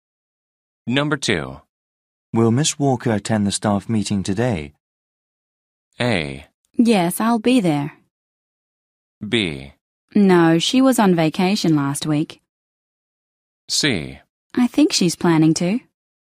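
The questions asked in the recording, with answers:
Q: Will Miss Walker attend the staff meeting today?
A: C: I think she's planning to.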